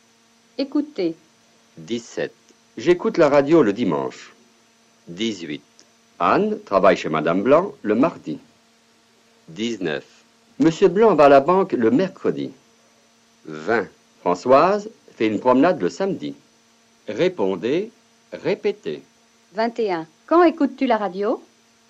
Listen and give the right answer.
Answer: J'écoute la radio le dimanche.